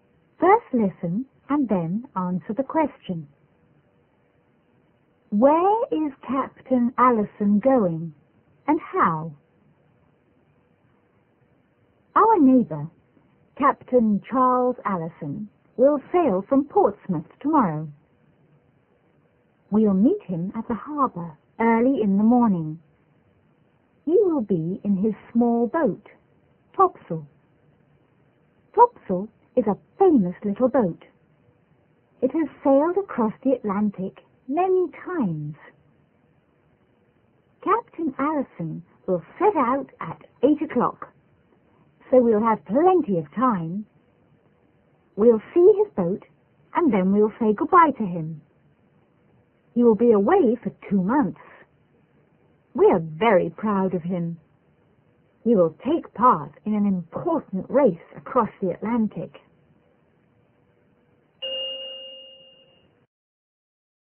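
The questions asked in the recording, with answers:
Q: Where is Captain Allison going and how?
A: Across the Atlantic, in his small boat Topsail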